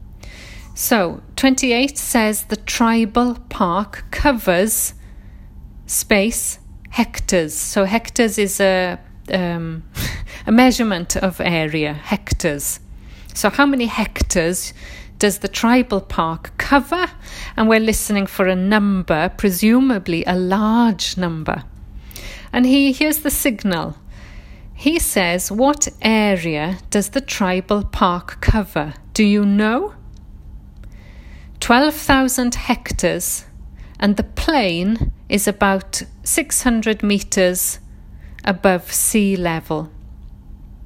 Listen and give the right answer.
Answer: 12,000 is the answer.